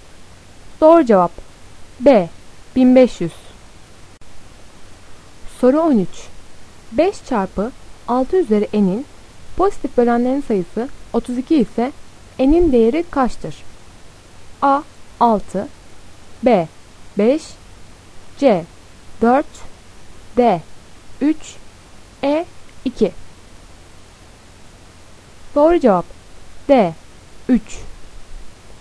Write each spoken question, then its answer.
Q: 5 çarpı 6 üzeri n'in pozitif bölenlerin sayısı 32 ise n'in değeri kaçtır?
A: Doğru cevap D 3.